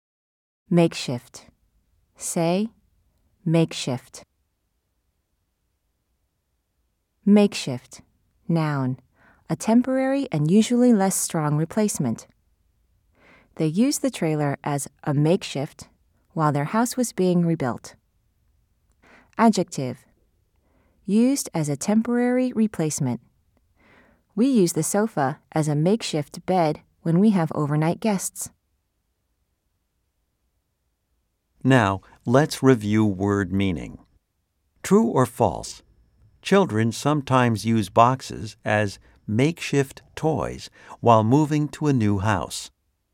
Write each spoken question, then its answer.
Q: True or false? Children sometimes use boxes as makeshift toys while moving to a new house.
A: If you said true, you are right.